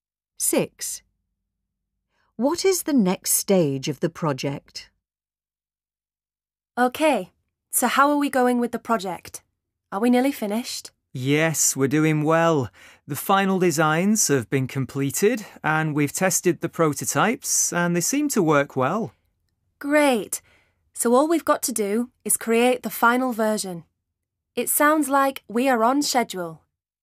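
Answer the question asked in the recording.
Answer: Create the final version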